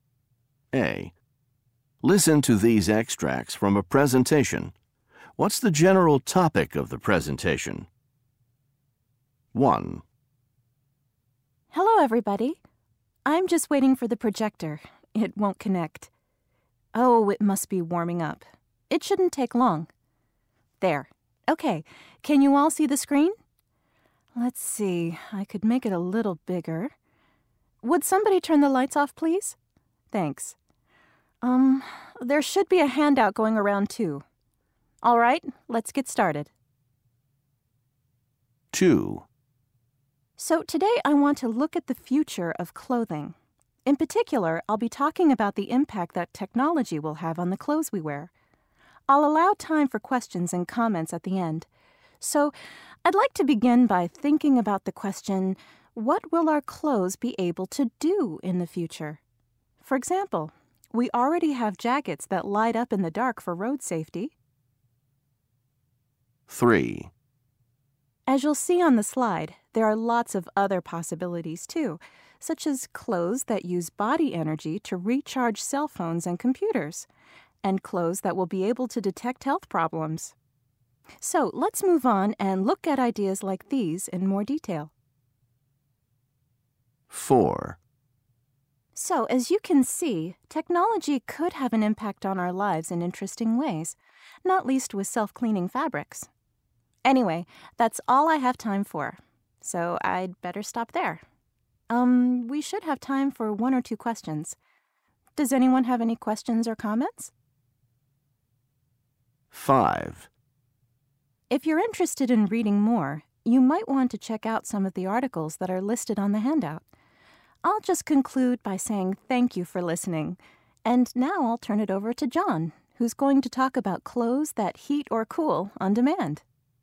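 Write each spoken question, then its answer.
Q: What's the general topic of the presentation?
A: The future of clothing and the impact of technology on the clothes we wear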